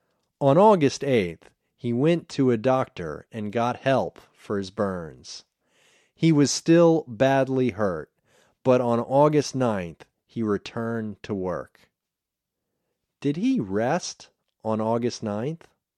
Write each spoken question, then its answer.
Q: Did he rest on August 9th?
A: No, he didn't rest. He returned to work.